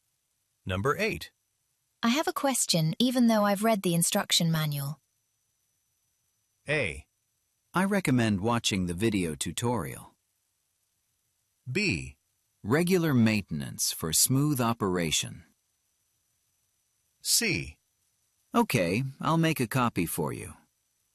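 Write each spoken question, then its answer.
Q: I have a question, even though I've read the instruction manual.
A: A: I recommend watching the video tutorial.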